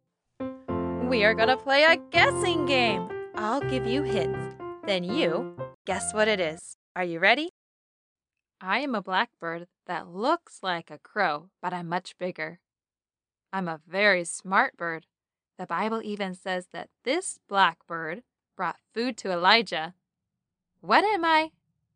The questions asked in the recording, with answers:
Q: What am I?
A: Raven.